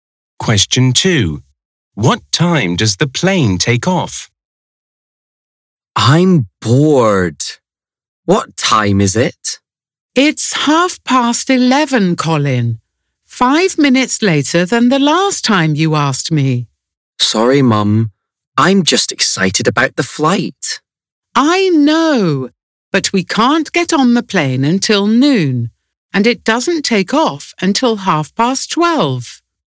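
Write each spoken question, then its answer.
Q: What time does the plane take off?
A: 12:30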